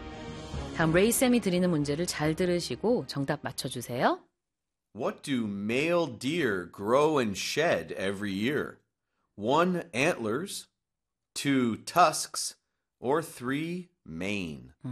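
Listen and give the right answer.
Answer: 1: Antlers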